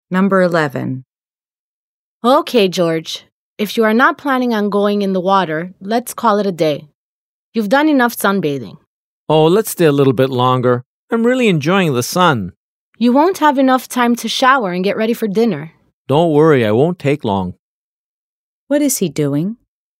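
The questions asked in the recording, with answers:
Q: What is he doing?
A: Sunbathing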